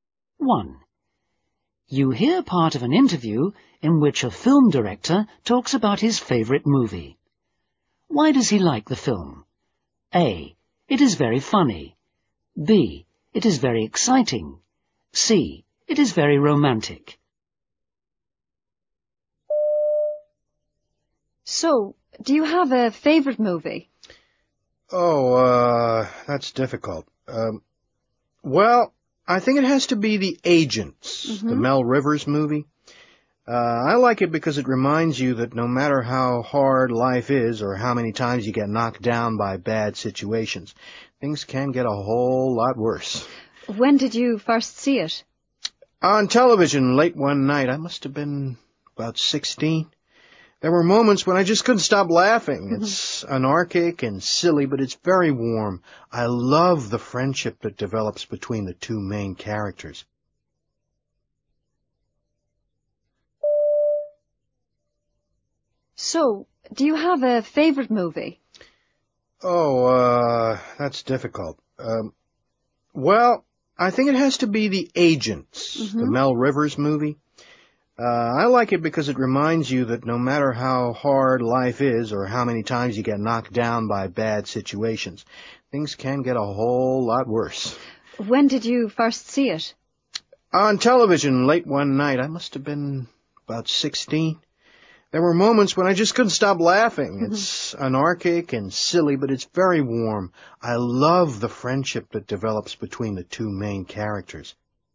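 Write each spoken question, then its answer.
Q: Why does he like the film?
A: A: It is very funny.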